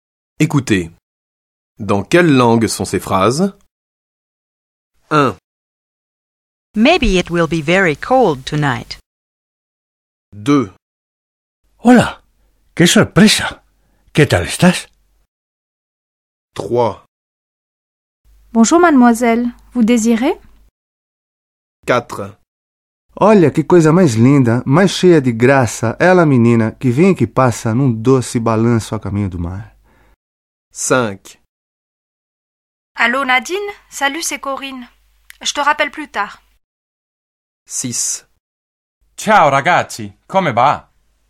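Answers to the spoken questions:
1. anglais
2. espagnol
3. français
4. portugais
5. français
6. italien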